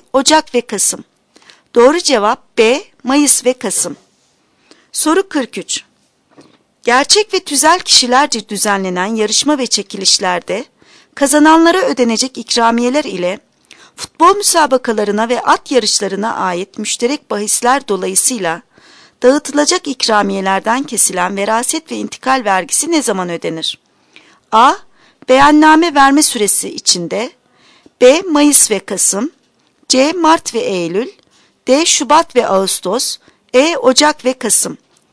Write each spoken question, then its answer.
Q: Gerçek ve tüzel kişilerce düzenlenen yarışma ve çekilişlerde kazananlara ödenecek ikramiyeler ile futbol müsabakalarına ve at yarışlarına ait müşterek bahisler dolayısıyla dağıtılacak ikramiyelerden kesilen veraset ve intikal vergisi ne zaman ödenir?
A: Doğru cevap A. Beyanname verme süresi içinde.